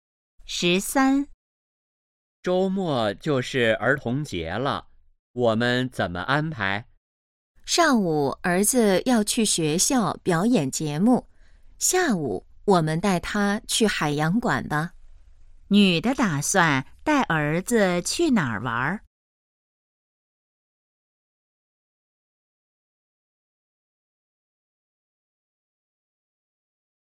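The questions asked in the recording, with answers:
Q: 女的打算带儿子去哪儿玩?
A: 海洋馆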